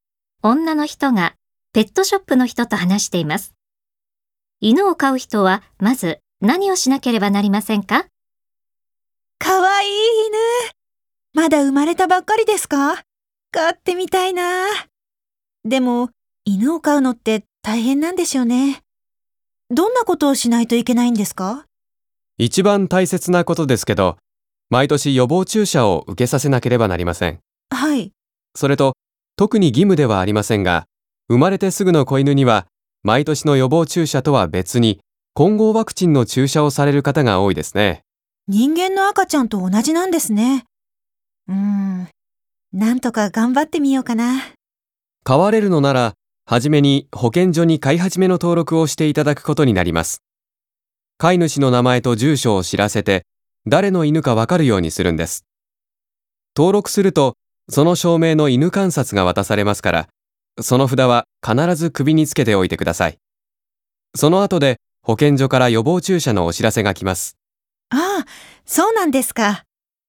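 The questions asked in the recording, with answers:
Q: 犬を飼う人はまず何をしなければなりませんか?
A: 保健所に飼い始めの登録をする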